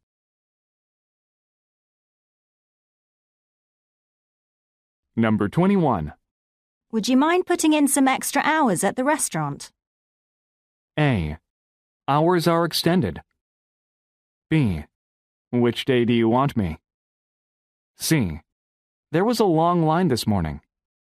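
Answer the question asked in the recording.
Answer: B: Which day do you want me?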